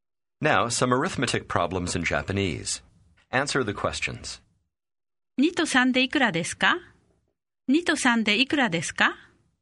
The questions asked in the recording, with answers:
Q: 2と3でいくらですか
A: 5 2と3で5です。